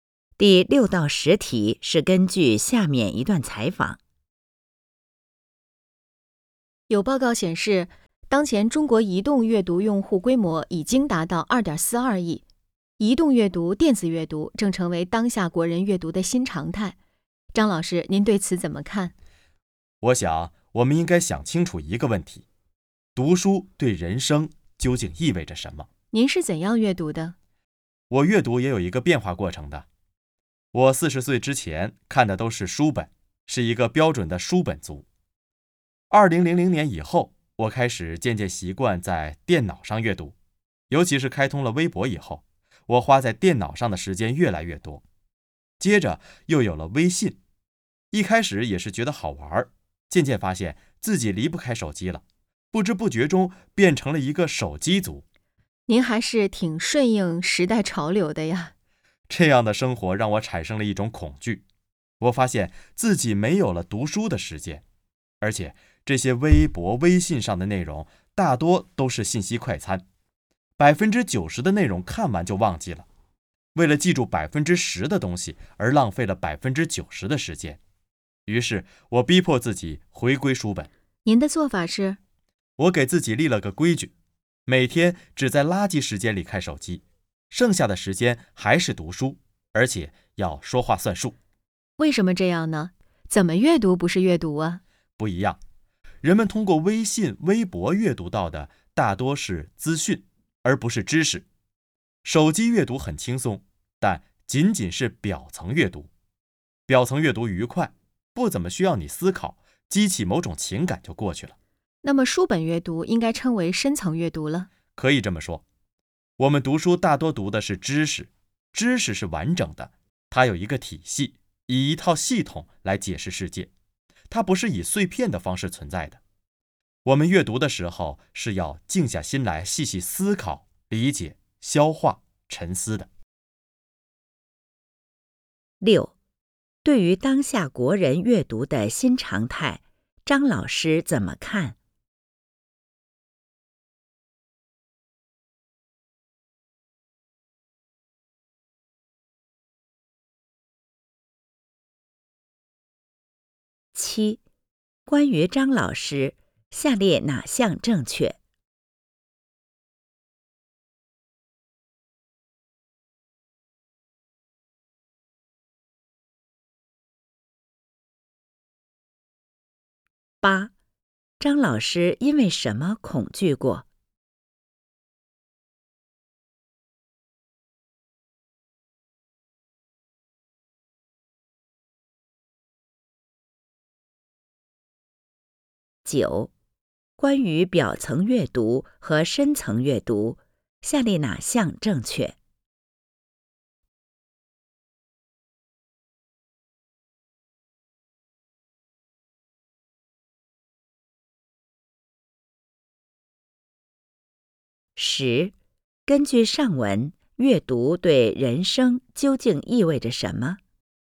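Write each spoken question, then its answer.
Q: 张老师因为什么恐惧过?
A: 发现自己没有了读书的时间,浪费时间看信息快餐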